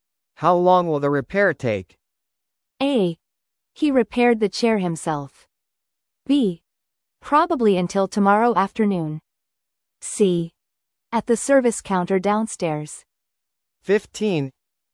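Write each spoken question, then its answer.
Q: How long will the repair take?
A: B: Probably until tomorrow afternoon.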